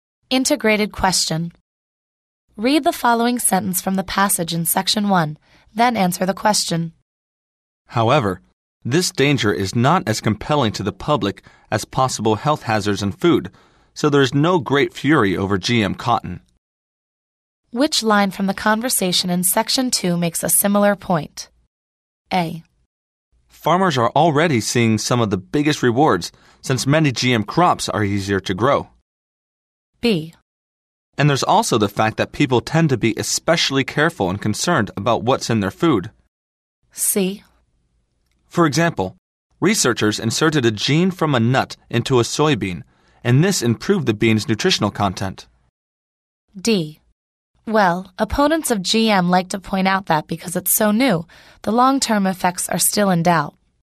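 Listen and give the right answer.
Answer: B: And there's also the fact that people tend to be especially careful and concerned about what's in their food.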